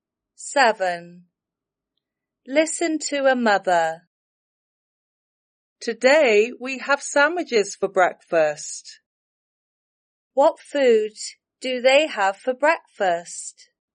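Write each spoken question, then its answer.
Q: What food do they have for breakfast?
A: sandwiches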